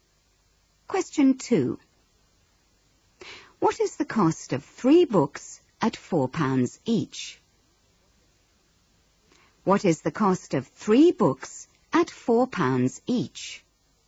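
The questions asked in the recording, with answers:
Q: What is the cost of 3 books at £4 each?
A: £12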